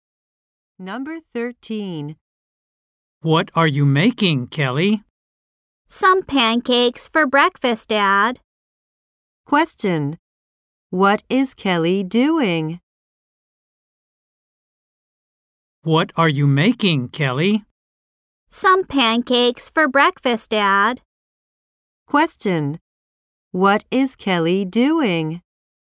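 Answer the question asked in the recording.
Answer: Making pancakes for breakfast.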